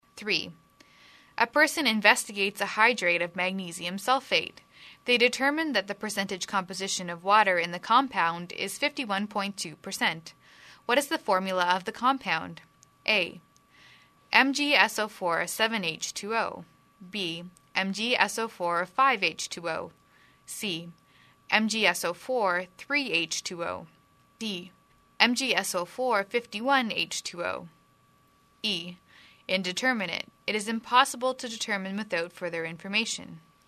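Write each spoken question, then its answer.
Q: What is the formula of the compound?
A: A: MgSO4-7H2O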